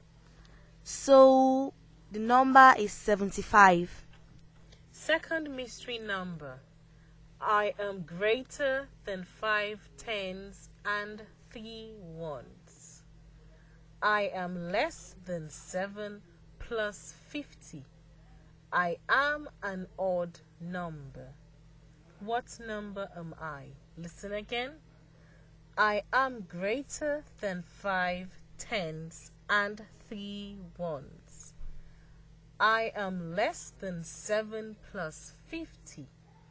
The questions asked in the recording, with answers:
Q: What number am I?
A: I am the number 55.